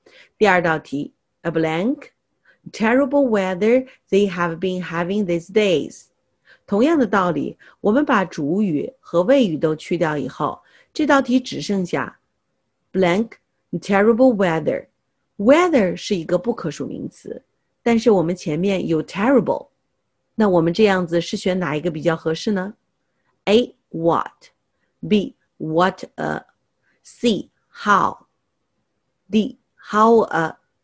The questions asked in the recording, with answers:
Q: A blank terrible weather they have been having these days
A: 那只能选 A, what.